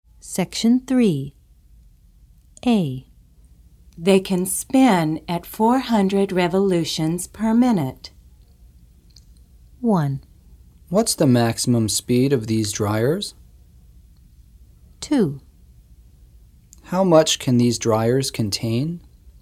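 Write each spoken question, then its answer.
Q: They can spin at 400 revolutions per minute.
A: 1: What's the maximum speed of these dryers?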